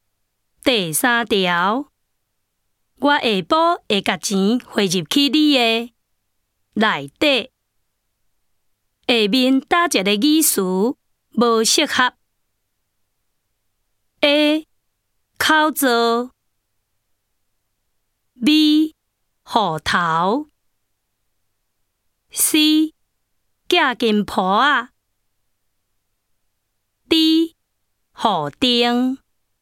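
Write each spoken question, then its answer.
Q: 下面打一个语词无适合。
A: B: 户头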